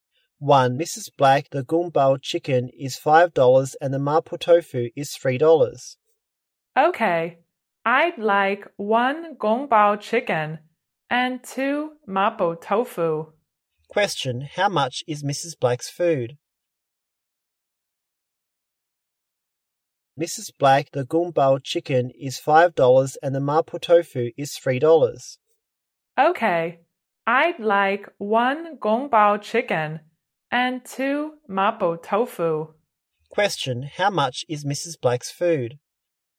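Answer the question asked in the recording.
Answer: $11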